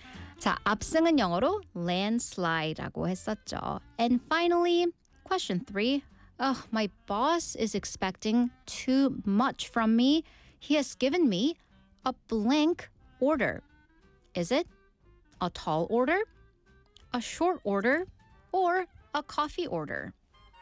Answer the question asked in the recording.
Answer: 자, 내가 하기 힘든 무리한 요구, a tall order 였습니다.